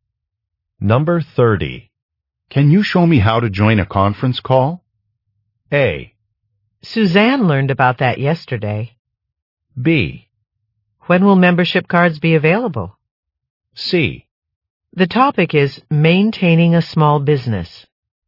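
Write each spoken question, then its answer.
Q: Can you show me how to join a conference call?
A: A: Suzanne learned about that yesterday.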